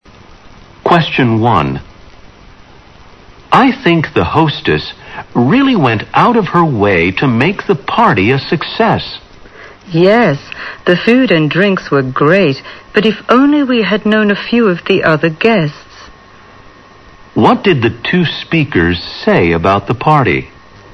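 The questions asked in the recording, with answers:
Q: What did the two speakers say about the party?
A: The hostess and food were great, but they didn't know the other guests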